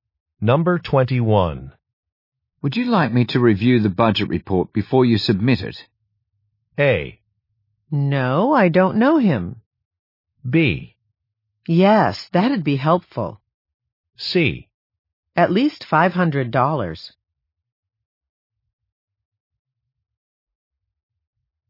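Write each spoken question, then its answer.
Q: Would you like me to review the budget report before you submit it?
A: B: Yes, that'd be helpful.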